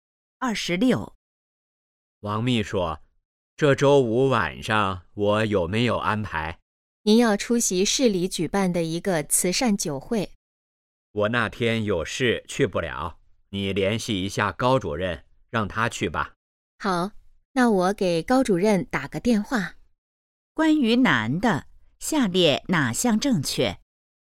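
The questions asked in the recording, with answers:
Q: 关于男的,下列哪项正确?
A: 周五去不了慈善酒会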